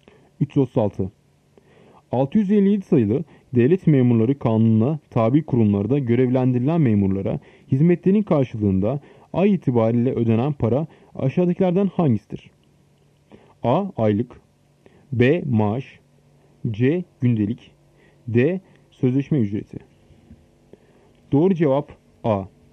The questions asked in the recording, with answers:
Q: 657 sayılı Devlet Memurları Kanunu'na tabi kurumlarda görevlendirilen memurlara hizmetlerin karşılığında ay itibariyle ödenen para aşağıdakilerden hangisidir?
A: Doğru cevap A. Aylık.